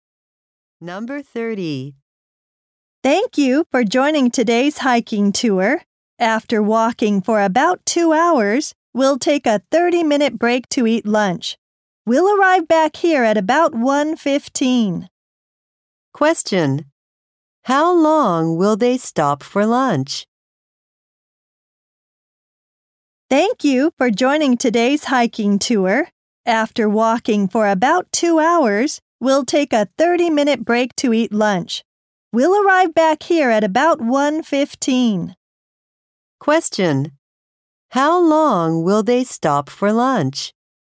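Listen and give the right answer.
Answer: 30 minutes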